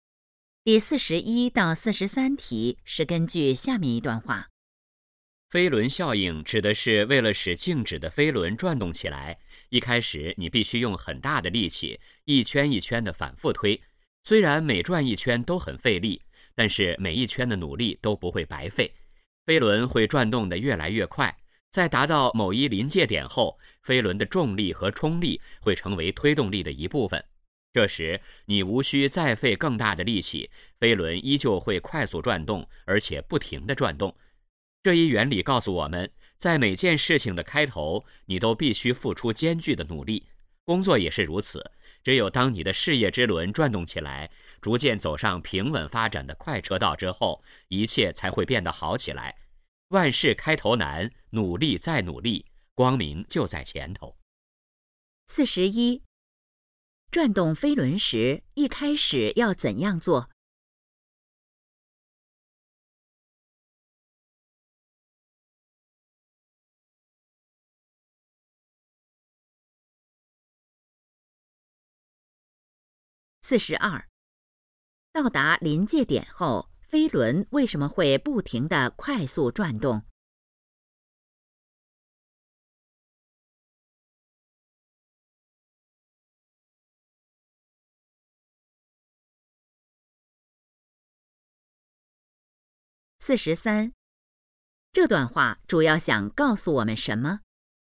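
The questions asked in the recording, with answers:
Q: 转动飞轮时,一开始要怎样做?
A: 用很大的力气反复推

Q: 到达临界点后,飞轮为什么会不停地快速转动?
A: 飞轮的重力和冲力成为推动力的一部分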